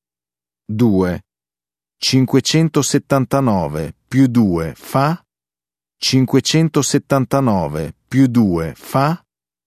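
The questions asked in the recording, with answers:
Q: 579 più 2 fa?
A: 581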